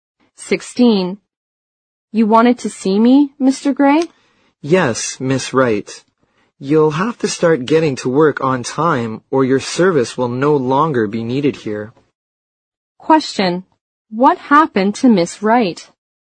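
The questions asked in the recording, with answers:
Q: What happened to Miss Wright?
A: She was warned that she would lose her job if she kept arriving late for work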